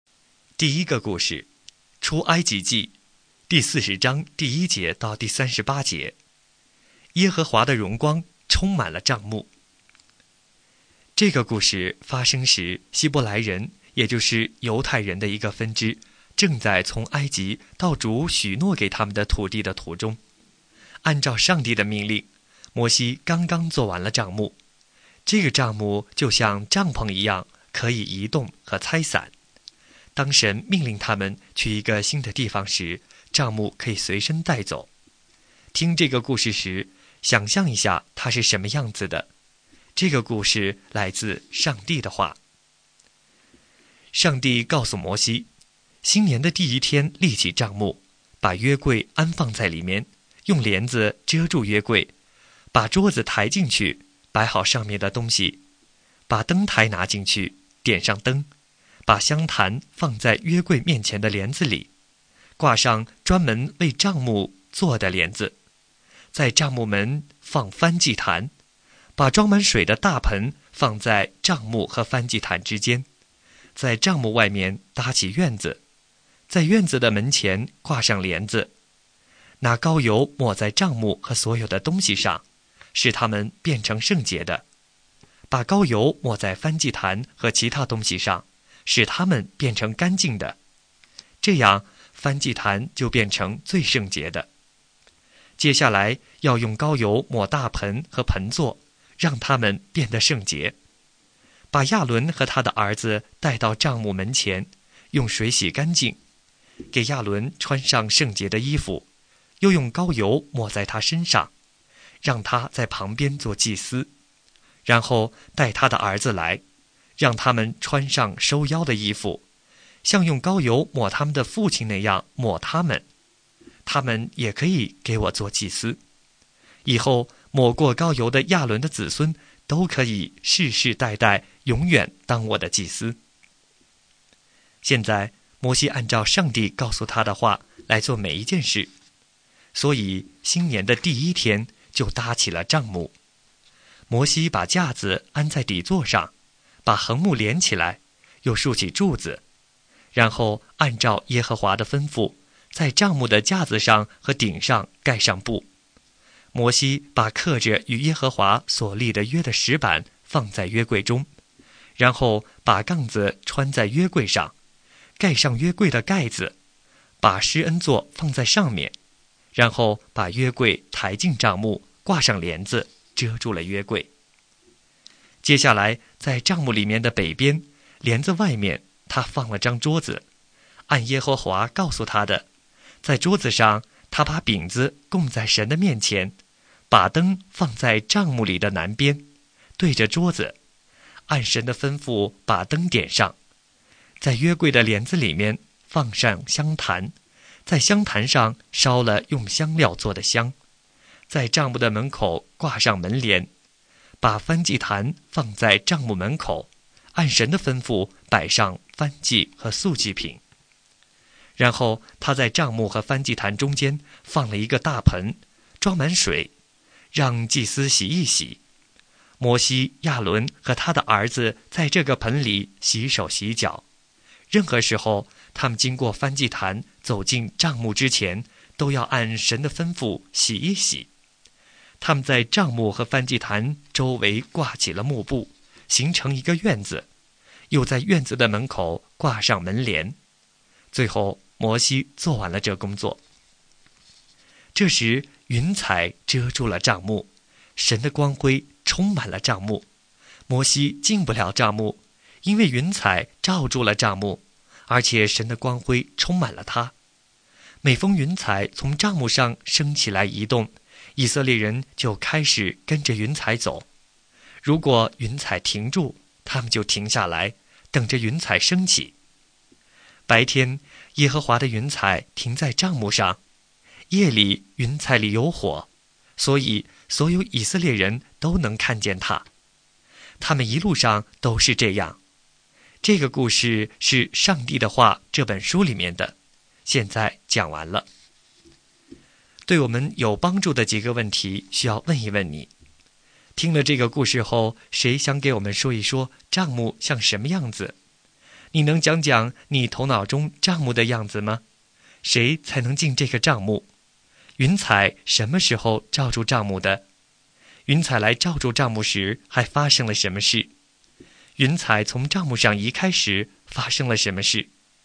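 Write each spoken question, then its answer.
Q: 云彩什么时候罩住账目的?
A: 摩西做完了搭帐幕的工作的时候

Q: 云彩来罩住账目时还发生了什么事?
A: 神的光辉充满了帐幕,摩西进不了帐幕

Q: 云彩从账目上移开时发生了什么事?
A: 以色列人就开始跟着云彩走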